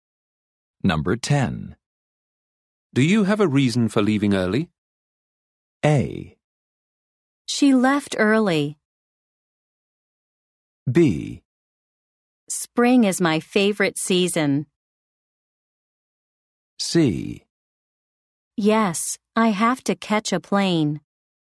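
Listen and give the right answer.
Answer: C: Yes, I have to catch a plane.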